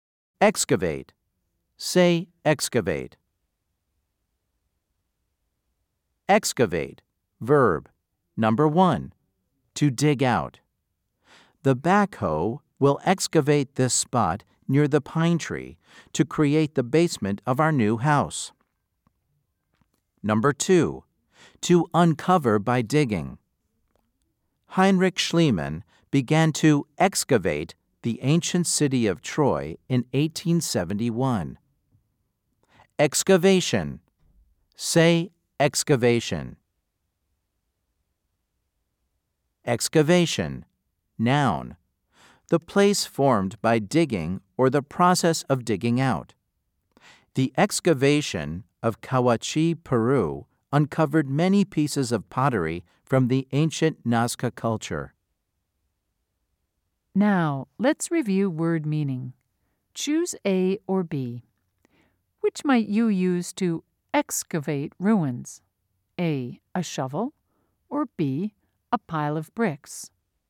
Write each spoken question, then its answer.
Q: Choose A or B. Which might you use to excavate ruins?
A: If you said A, you are right.